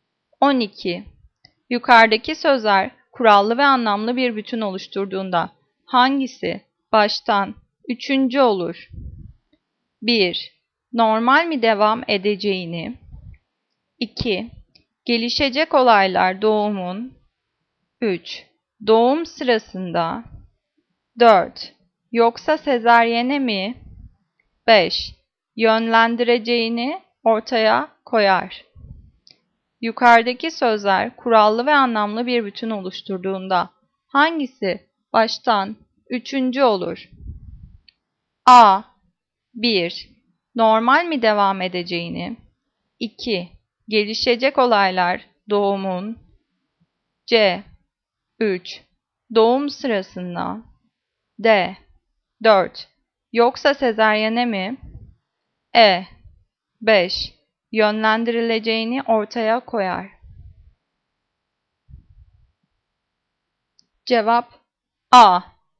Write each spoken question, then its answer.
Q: Yukarıdaki sözler kurallı ve anlamlı bir bütün oluşturduğunda hangisi baştan üçüncü olur?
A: Cevap A. 1. Normal mi devam edeceğini?